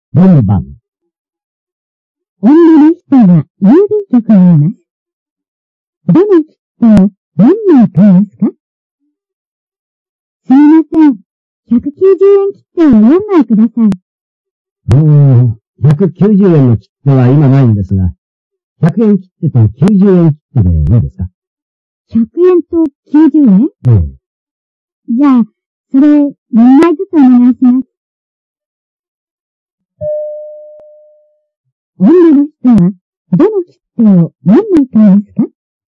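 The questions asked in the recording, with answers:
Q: 女の人は、どの切符を何枚買いますか?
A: 100円の切符と90円の切符を4枚ずつ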